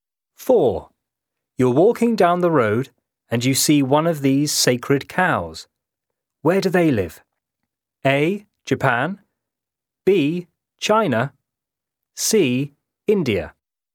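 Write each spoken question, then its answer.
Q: Where do they live?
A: C: India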